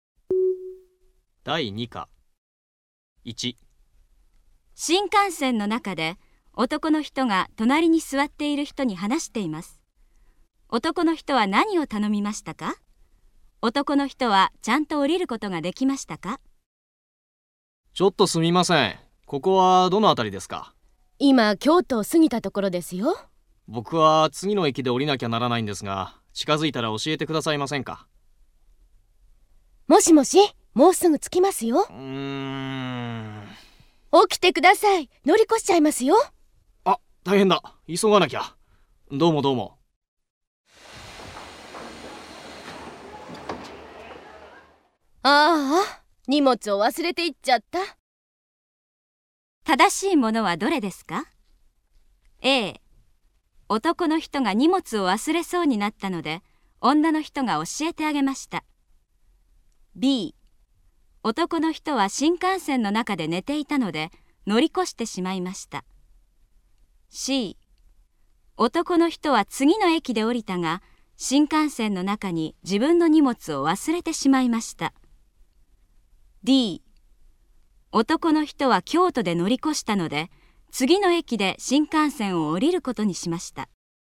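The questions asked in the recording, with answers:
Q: 正しいものはどれですか?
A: C: 男の人は次の駅で降りたが新幹線の中に自分の荷物を忘れてしまいました。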